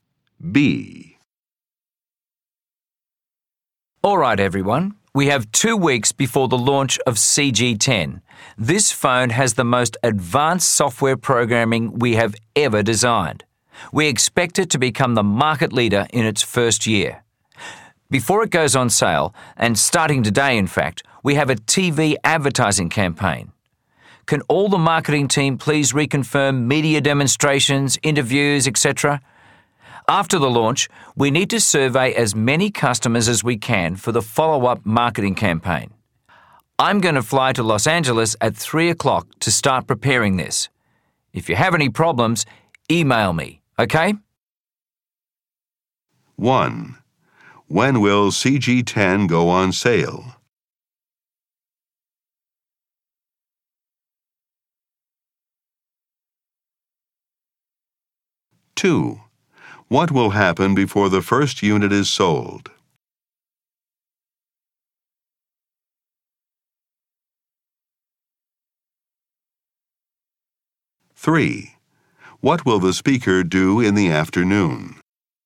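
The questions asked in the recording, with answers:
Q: When will CG10 go on sale?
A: In 2 weeks

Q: What will happen before the first unit is sold?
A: A TV advertising campaign

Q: What will the speaker do in the afternoon?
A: Fly to Los Angeles at 3 o'clock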